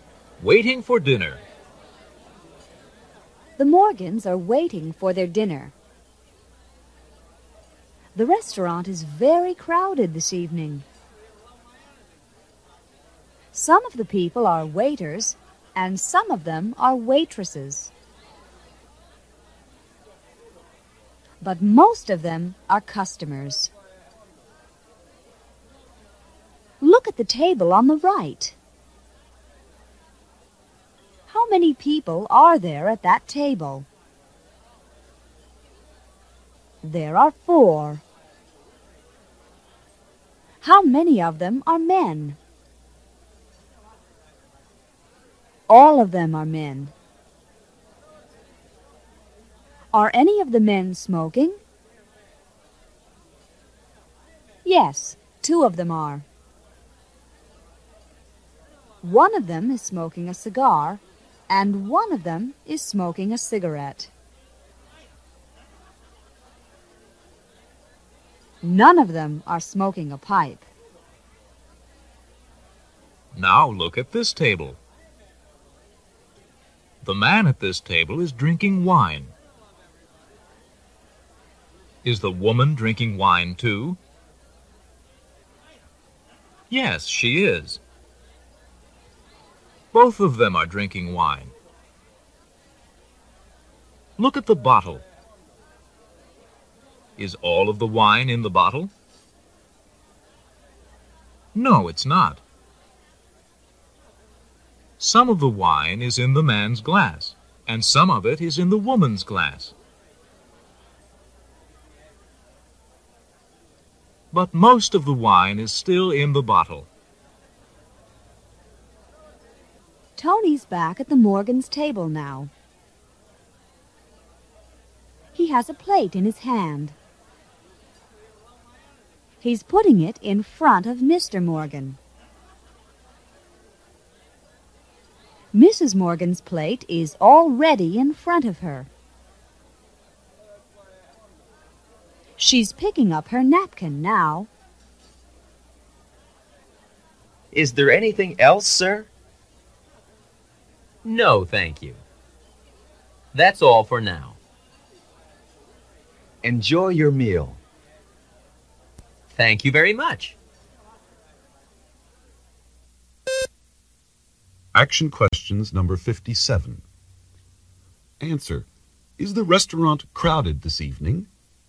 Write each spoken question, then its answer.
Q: Is the restaurant crowded this evening?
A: Yes, it is.